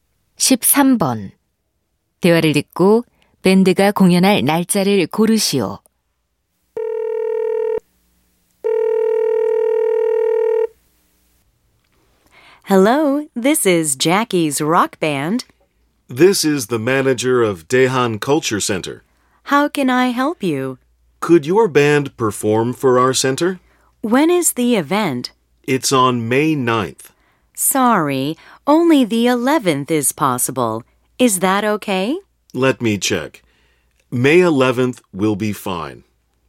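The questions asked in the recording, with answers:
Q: 대화를 듣고 밴드가 공연할 날짜를 고르시오.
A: 5월 11일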